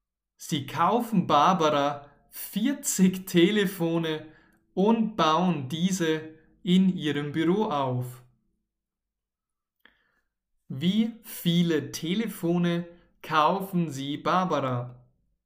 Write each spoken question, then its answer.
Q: Wie viele Telefone kaufen Sie Barbara?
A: 40. Sie kaufen Barbara 40 Telefone.